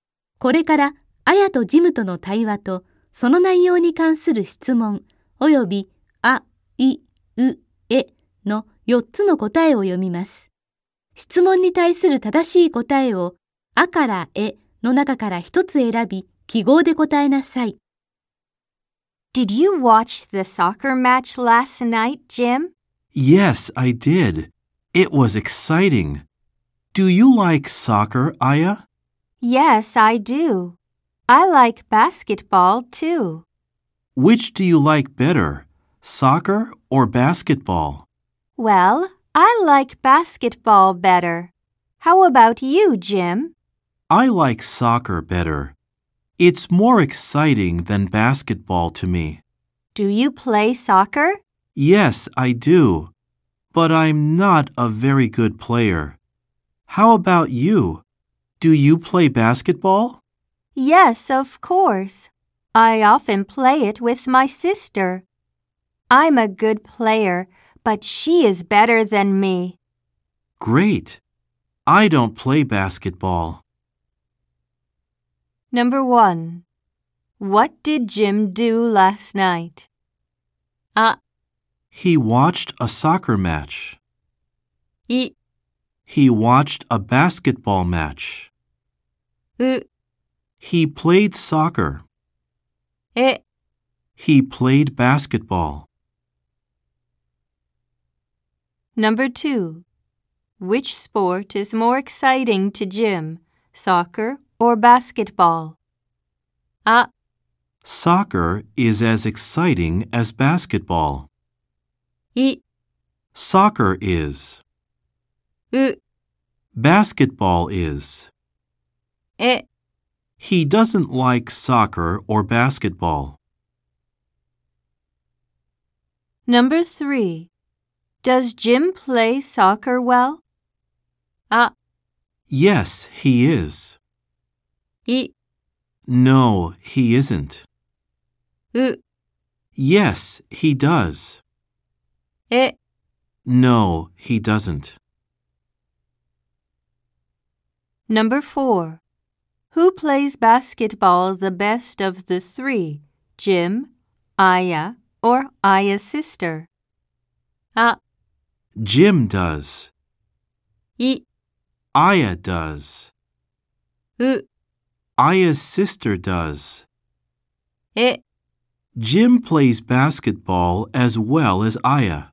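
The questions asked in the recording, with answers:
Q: what did Jim do last night?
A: あ: He watched a soccer match.

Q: which sport is more exciting to Jim, soccer or basketball?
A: い: Soccer is.

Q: Does Jim play soccer well?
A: え: No, he doesn't.

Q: Who plays basketball the best of the three?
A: う: Aya's sister does.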